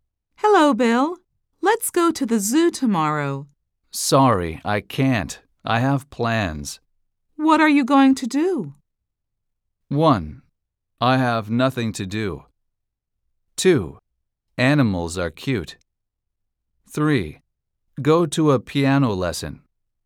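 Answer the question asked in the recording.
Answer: 3: Go to a piano lesson.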